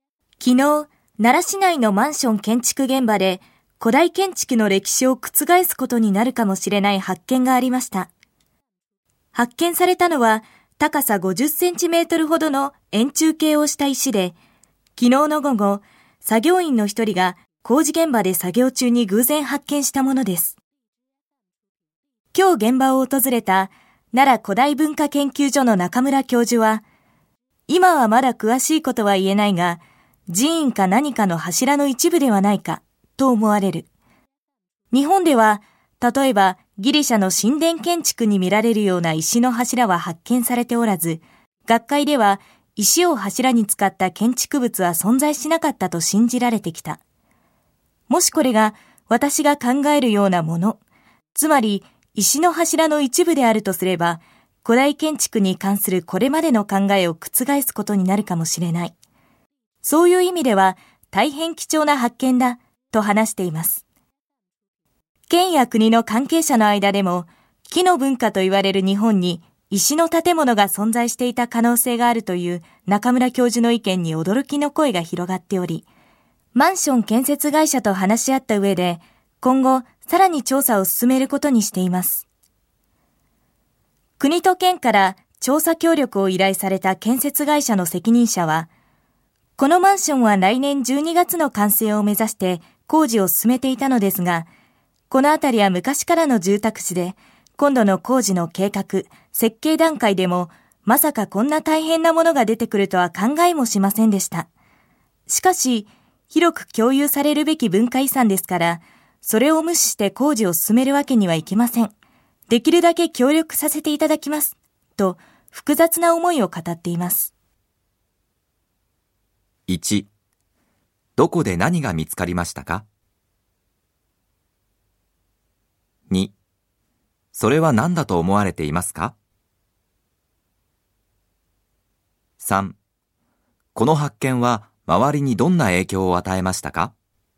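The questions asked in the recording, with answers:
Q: どこで何が見つかりましたか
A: 奈良市内のマンション建築現場で、高さ50センチほどの円柱形の石

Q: それは何だと思われていますか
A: 寺院か何かの石の柱の一部

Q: この発見は周りにどんな影響を与えましたか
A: 日本に石の建物があった可能性に関係者が驚き、建設会社と話し合ってさらに調査を進めることになった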